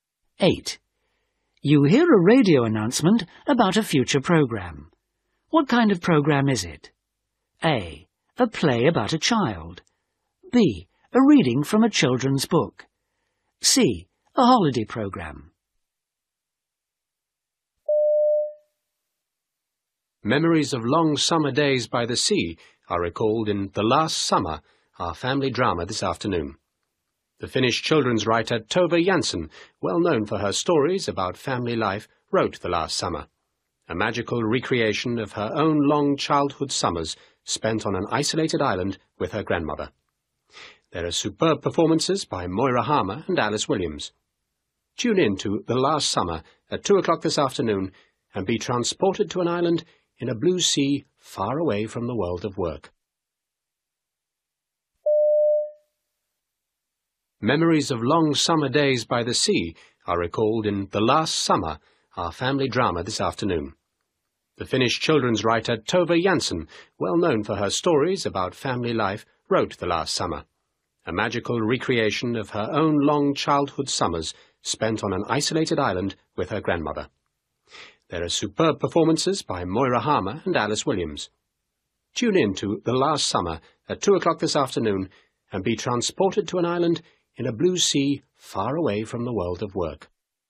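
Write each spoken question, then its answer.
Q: What kind of programme is it?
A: A: A play about a child.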